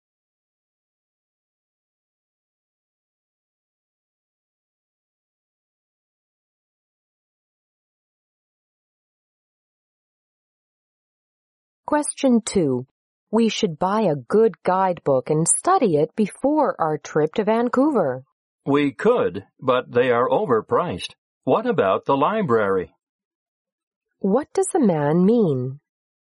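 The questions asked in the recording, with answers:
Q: What does the man mean?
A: They could borrow a guidebook from the library instead of buying one.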